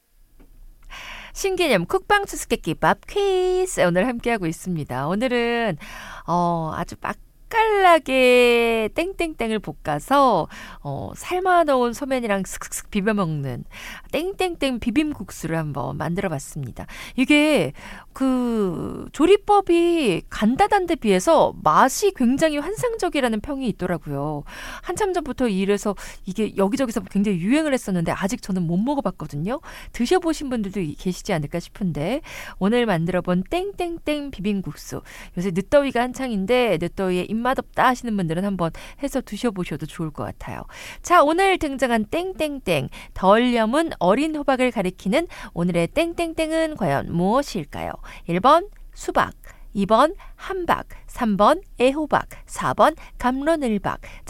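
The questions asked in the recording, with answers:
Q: 자, 오늘 등장한 땡땡땡 덜 염은 어린 호박을 가리키는 오늘의 땡땡땡은 과연 무엇일까요?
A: 3: 애호박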